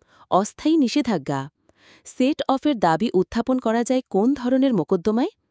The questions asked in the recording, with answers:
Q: সেট অফের দাবি উত্থাপন করা যায় কোন ধরনের মোকদ্দমায়?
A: অর্থ আদায়ের।